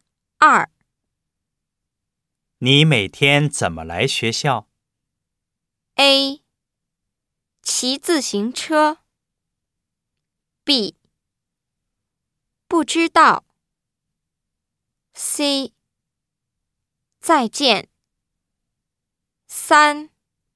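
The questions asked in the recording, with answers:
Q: 你每天怎么来学校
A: A: 骑自行车。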